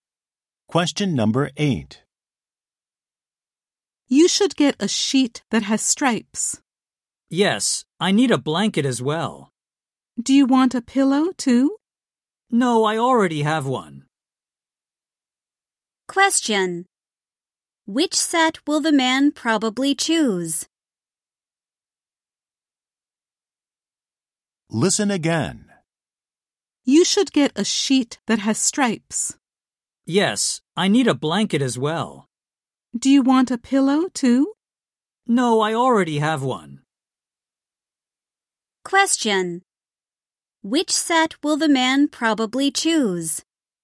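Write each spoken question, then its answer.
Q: Which set will the man probably choose?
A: A striped sheet and a blanket, without a pillow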